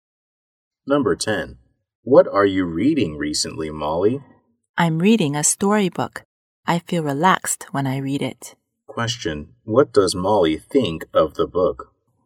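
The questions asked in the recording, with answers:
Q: what does Molly think of the book?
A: Relaxing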